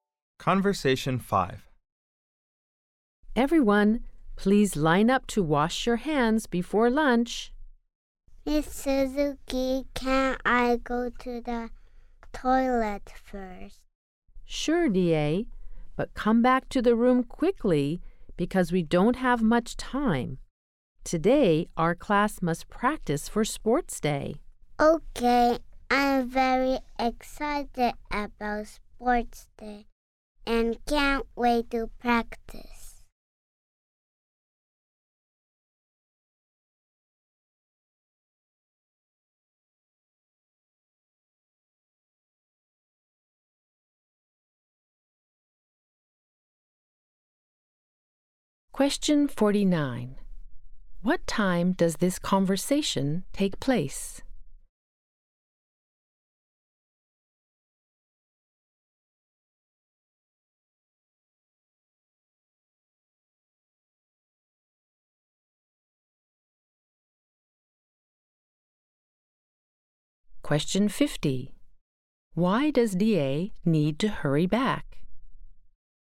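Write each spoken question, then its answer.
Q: What time does this conversation take place?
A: Before lunch

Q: Why does DA need to hurry back?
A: The class must practice for sports day and there isn't much time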